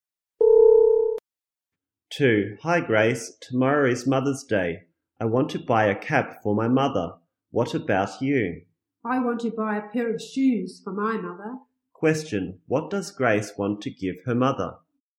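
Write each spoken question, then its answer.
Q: Question, what does Grace want to give her mother?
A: A pair of shoes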